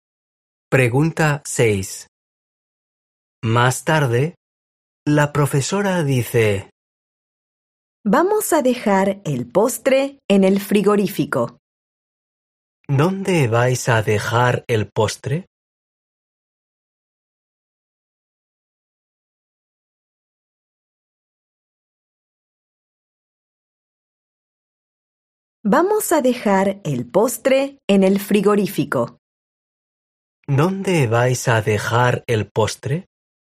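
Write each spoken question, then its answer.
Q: ¿Dónde vais a dejar el postre?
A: En el frigorífico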